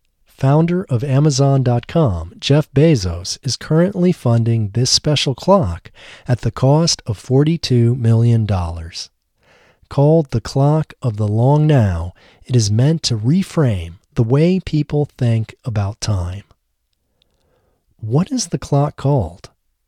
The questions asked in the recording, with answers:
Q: What is the clock called?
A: The clock is called the Clock of the Long Now.